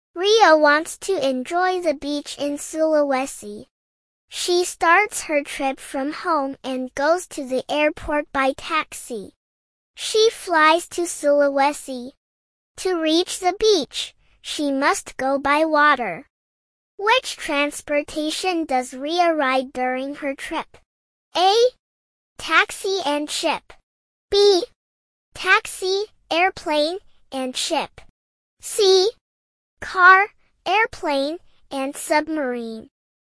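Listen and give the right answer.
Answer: B: Taxi, airplane, and ship.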